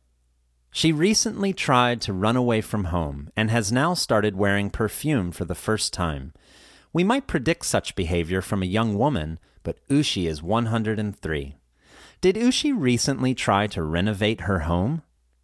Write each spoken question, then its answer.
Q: Did Ushi recently try to renovate her home?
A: No, she didn't. She tried to run away from home.